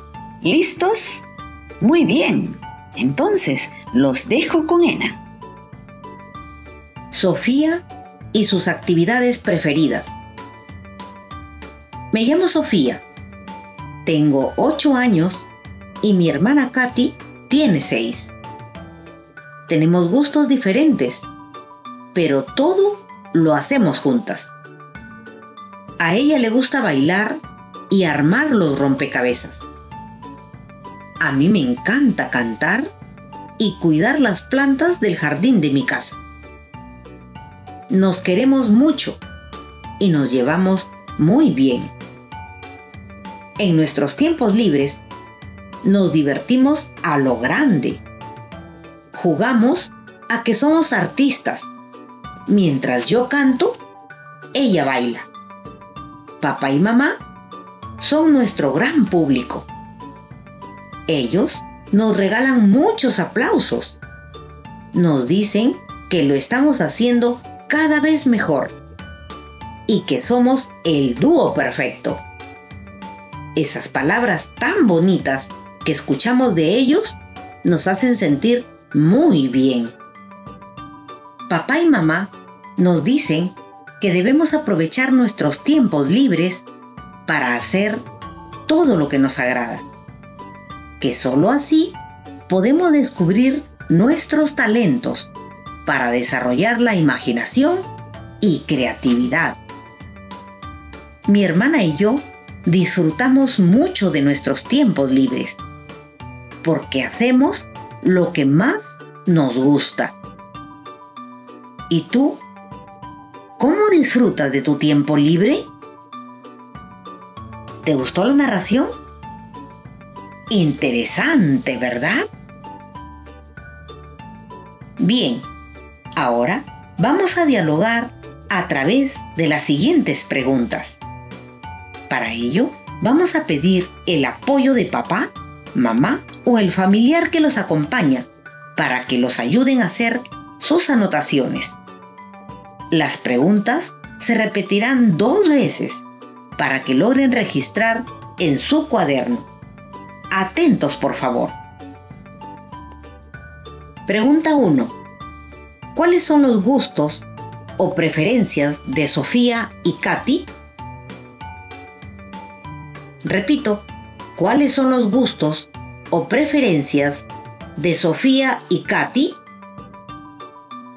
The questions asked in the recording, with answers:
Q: ¿Cuáles son los gustos o preferencias de Sofía y Katy?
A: A Sofía le gusta cantar y cuidar las plantas del jardín de su casa. Y a Katy le encanta bailar y armar rompecabezas.